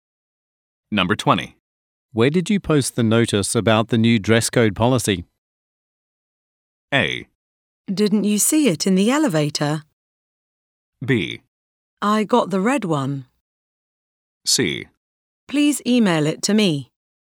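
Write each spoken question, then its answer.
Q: Where did you post the notice about the new dress code policy?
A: A: Didn't you see it in the elevator?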